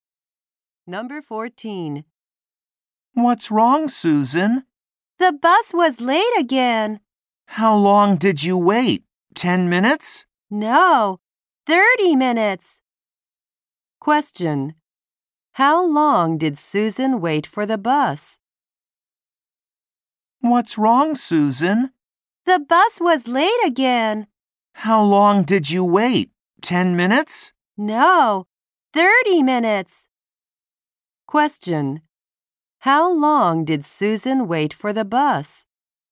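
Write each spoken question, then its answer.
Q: How long did Susan wait for the bus?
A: 30 minutes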